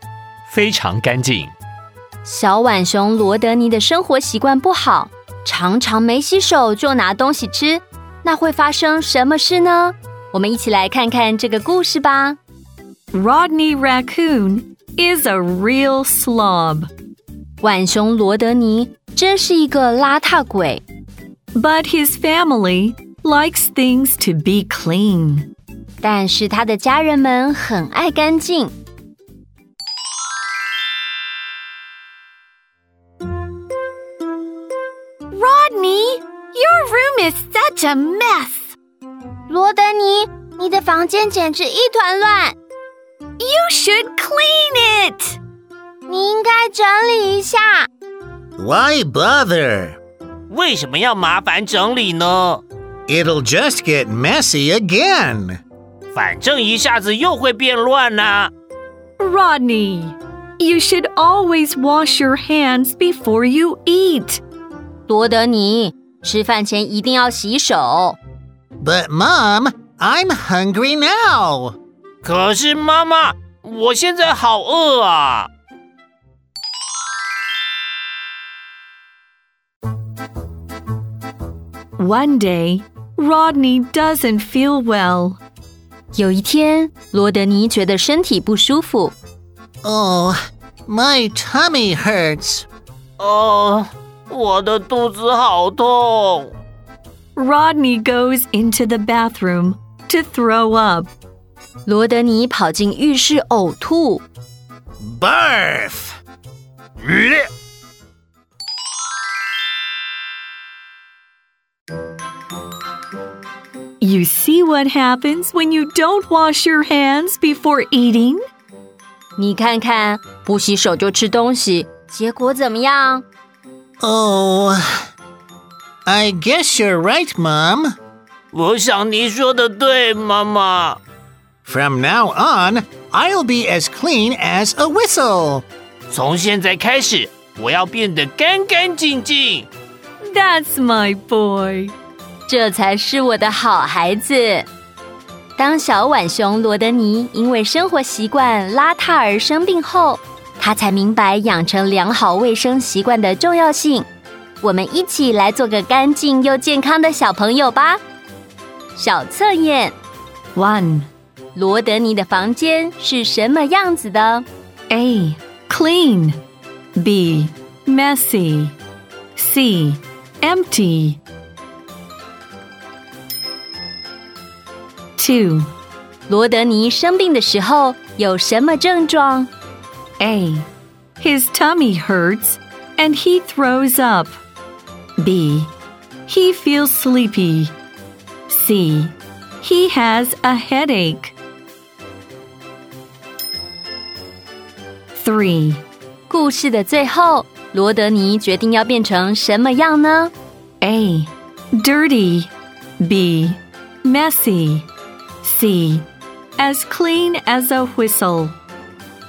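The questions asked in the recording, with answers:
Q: 罗德尼的房间是什么样子的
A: B: Messy

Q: 罗德尼生病的时候有什么症状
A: A: His tummy hurts and he throws up

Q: 故事的最后,罗德尼决定要变成什么样呢?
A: C: As clean as a whistle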